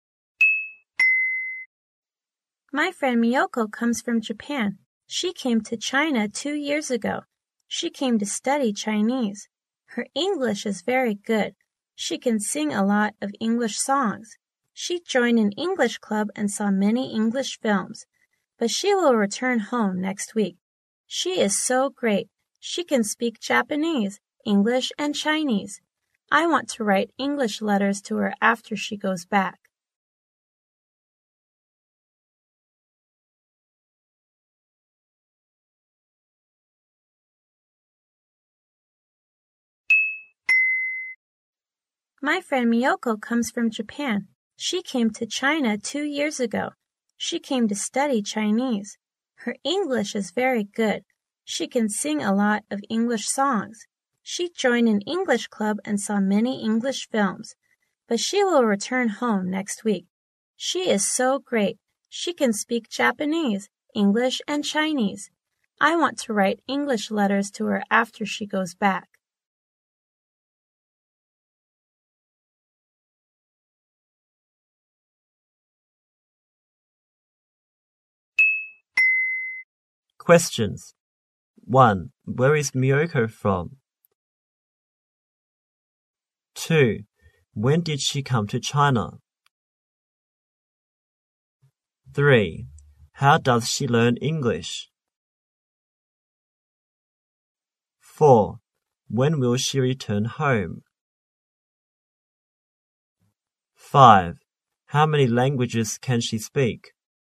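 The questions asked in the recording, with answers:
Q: Where is Miyoko from?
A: Japan

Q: When did she come to China?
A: 2 years ago

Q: When will she return home?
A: Next week

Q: How many languages can she speak?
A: Three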